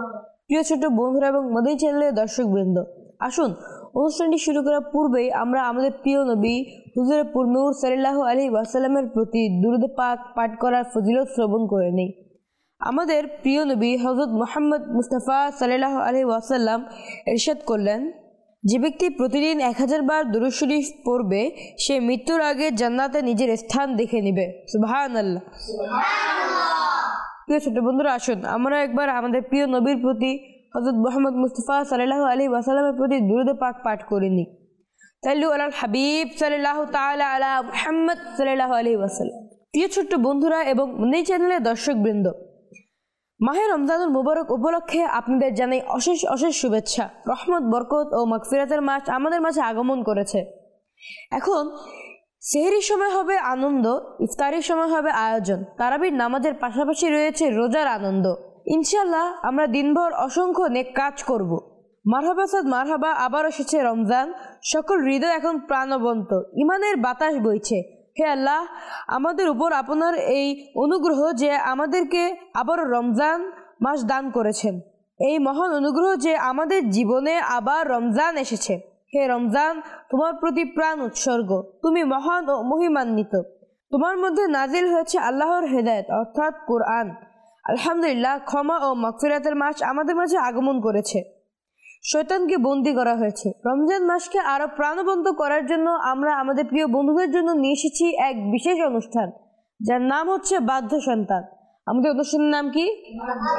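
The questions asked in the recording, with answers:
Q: আমাদের অনুষ্ঠানের নাম কি?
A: বাধ্য সন্তান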